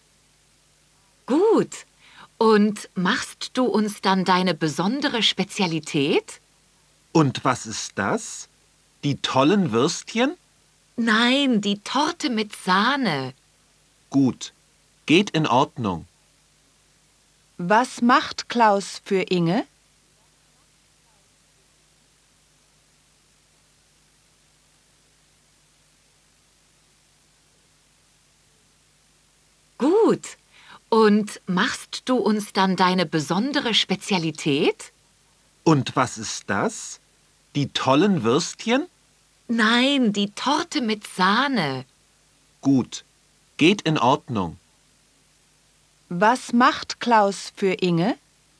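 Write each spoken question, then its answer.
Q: Was macht Klaus für Inge?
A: Die Torte mit Sahne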